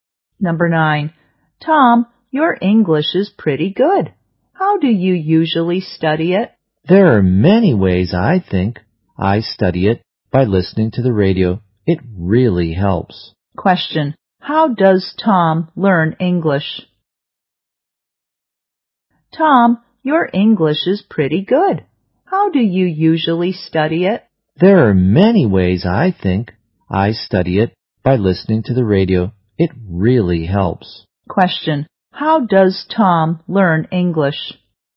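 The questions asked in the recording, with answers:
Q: How does Tom learn English?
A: By listening to the radio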